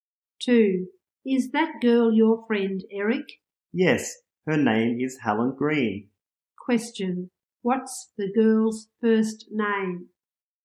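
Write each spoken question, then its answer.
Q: What's the girl's first name?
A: Helen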